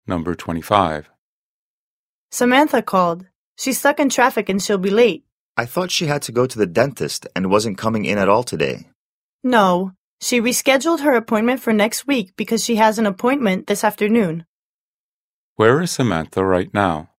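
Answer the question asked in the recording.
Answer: Stuck in traffic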